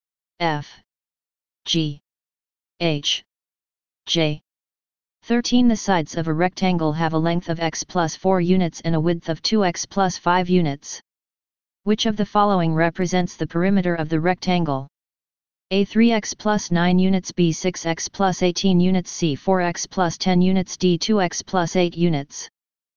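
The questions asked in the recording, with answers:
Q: Which of the following represents the perimeter of the rectangle?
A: B: 6x plus 18 units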